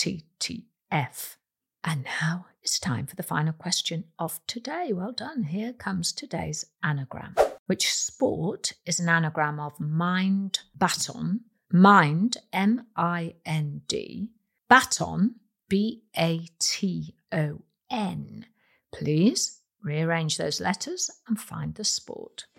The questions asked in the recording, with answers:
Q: Which sport is an anagram of mind baton?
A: The answer is badminton